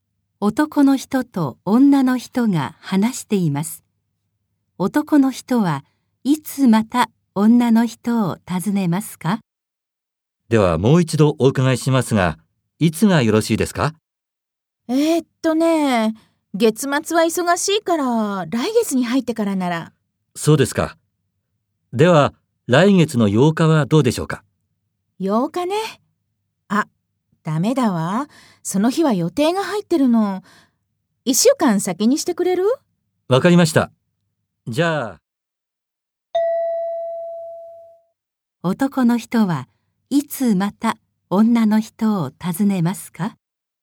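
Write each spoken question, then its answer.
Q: 男の人はいつまた女の人を訪ねますか?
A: 来月の15日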